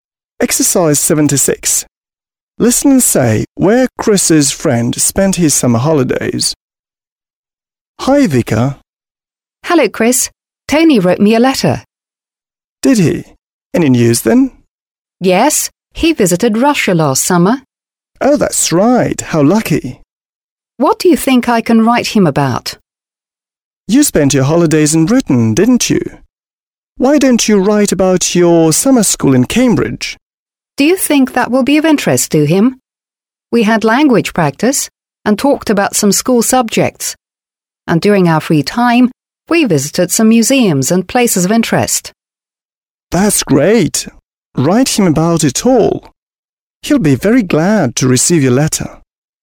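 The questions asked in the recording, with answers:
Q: Listen and say where Chris's friend spent his summer holidays.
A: In Russia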